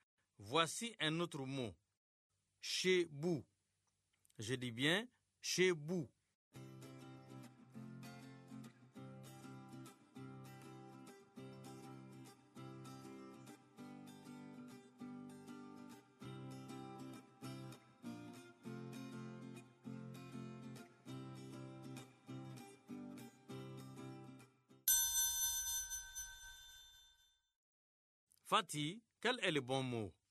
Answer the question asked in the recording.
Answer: Bouche.